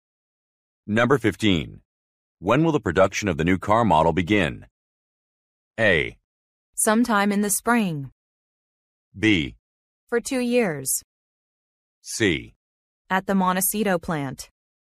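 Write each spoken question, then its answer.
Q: When will the production of the new car model begin?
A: A: Sometime in the spring.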